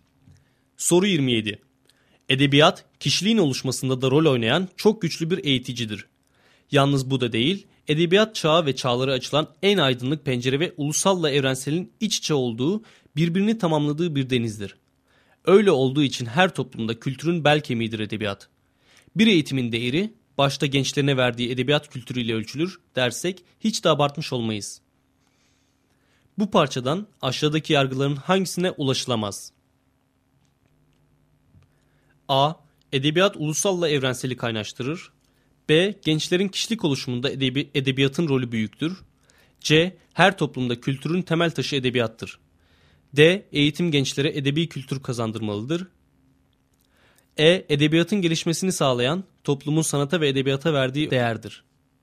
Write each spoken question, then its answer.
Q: Bu parçadan aşağıdaki yargıların hangisine ulaşılamaz?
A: Doğru cevap E şıkkı.